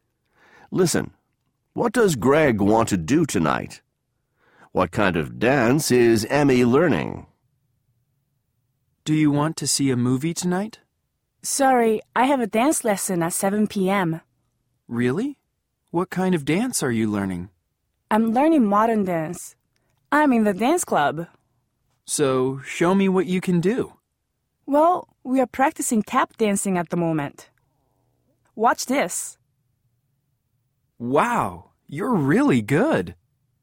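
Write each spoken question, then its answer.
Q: What does Greg want to do tonight?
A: See a movie

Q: What kind of dance is Emmy learning?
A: Modern dance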